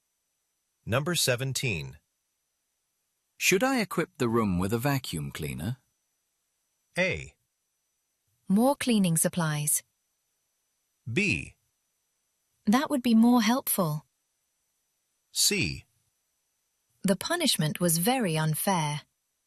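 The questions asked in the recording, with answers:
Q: Should I equip the room with a vacuum cleaner?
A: B: That would be more helpful.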